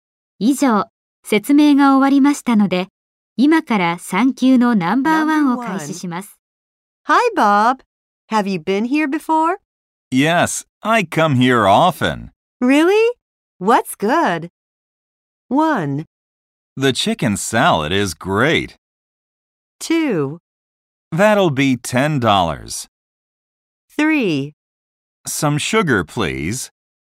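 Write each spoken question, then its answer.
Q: Really? What's good?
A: 1: The chicken salad is great.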